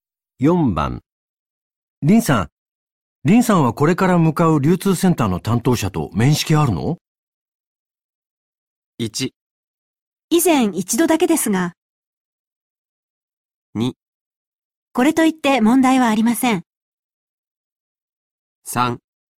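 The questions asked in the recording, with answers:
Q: 林さんはこれから向かう流通センターの担当者と面識あるの?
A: 1: 以前一度だけですが。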